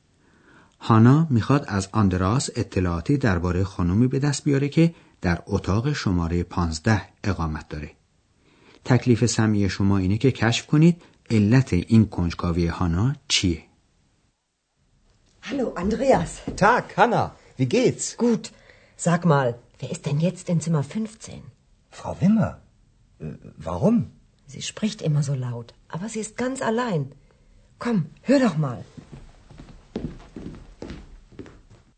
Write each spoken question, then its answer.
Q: تکلیف سمی شما اینه که کشف کنید علت این کنجکاوی هانا چیه.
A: پس علت اینکه هانا میخواد بدون کی در اتاق شماره 15 اقامت داره اینه که از اون اتاق اغلب صدای خانومی میاد که با صدای بلند حرف میزنه.